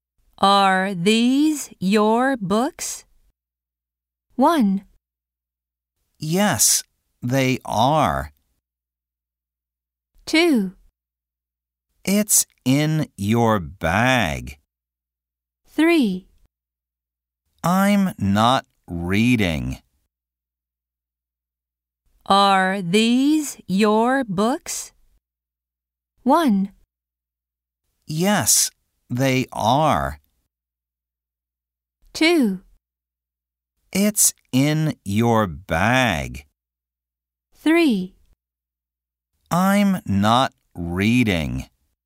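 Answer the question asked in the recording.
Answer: 1: Yes, they are.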